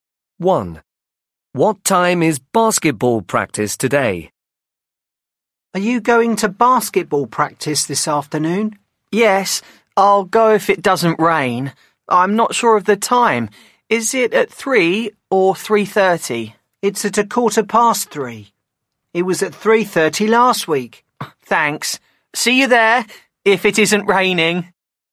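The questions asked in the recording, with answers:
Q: What time is basketball practice today?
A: 3:15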